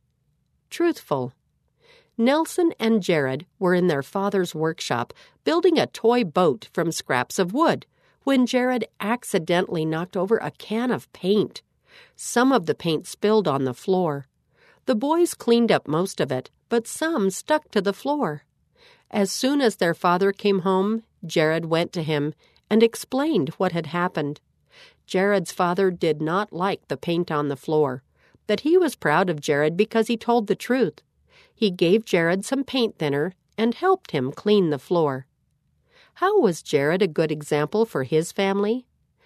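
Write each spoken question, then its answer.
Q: How was Jared a good example for his family?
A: He told his father the truth about spilling the paint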